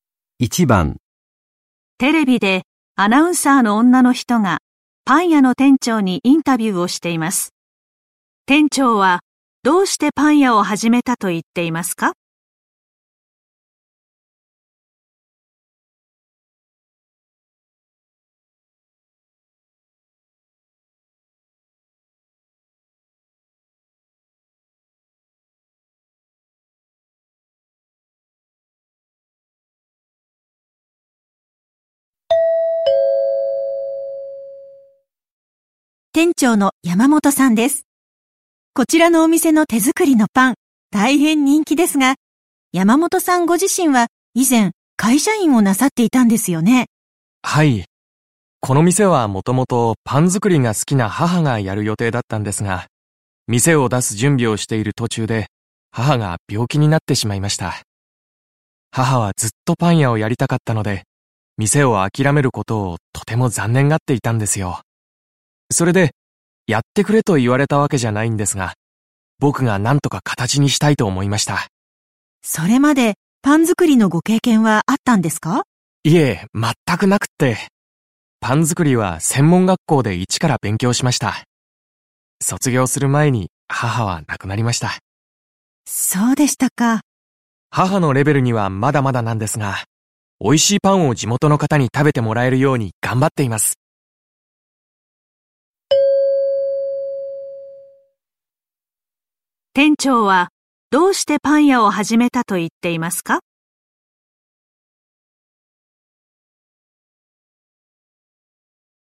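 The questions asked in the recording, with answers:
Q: 店長はどうしてパン屋を始めたと言っていますか?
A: パン屋をやりたかった母が病気で店を諦めたので、代わりに店を形にしたいと思ったから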